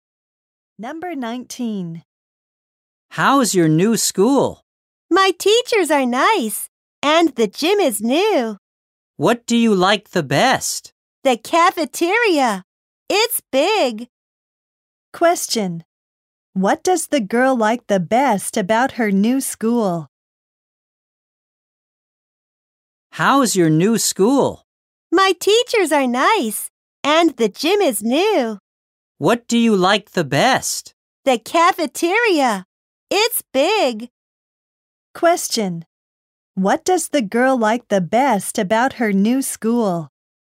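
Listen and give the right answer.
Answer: The cafeteria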